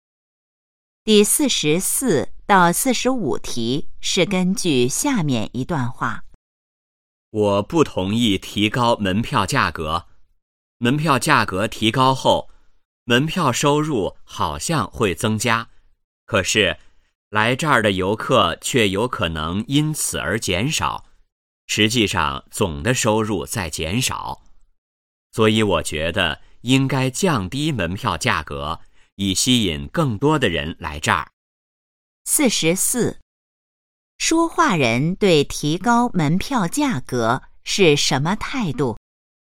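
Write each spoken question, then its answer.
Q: 说话人对提高门票价格是什么态度?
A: 不同意(反对)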